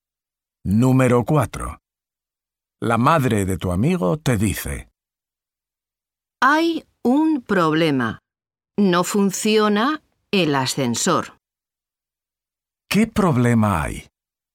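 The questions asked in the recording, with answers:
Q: ¿Qué problema hay?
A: No funciona el ascensor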